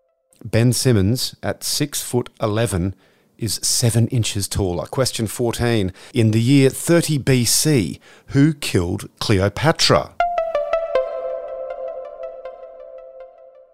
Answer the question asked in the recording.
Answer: Cleopatra killed herself.